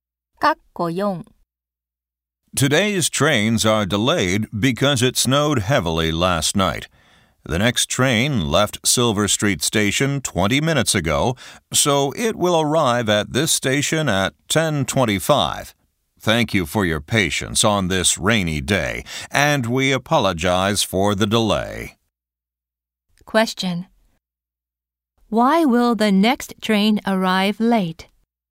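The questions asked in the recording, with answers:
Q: Why will the next train arrive late?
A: Because it snowed heavily last night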